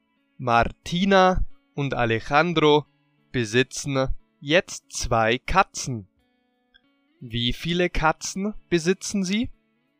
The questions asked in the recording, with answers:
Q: Wie viele Katzen besitzen Sie?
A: Zwei. Sie besitzen zwei Katzen.